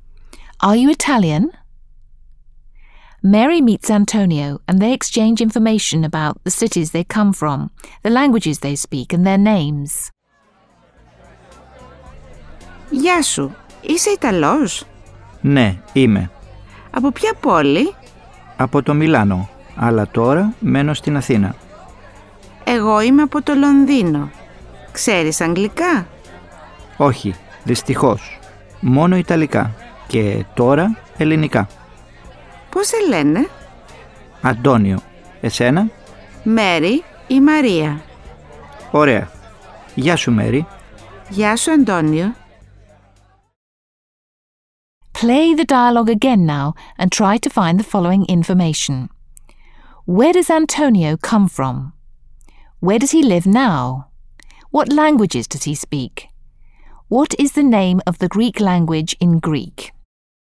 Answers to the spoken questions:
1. Antonio comes from Milan
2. but he lives in Athens now.
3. He speaks Italian and Greek.
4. Ελληνικά